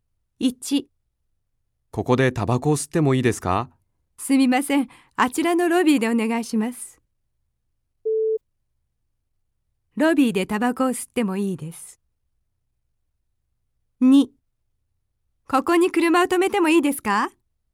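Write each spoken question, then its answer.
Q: ロビーでタバコを吸ってもいいです。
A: 正しい(○)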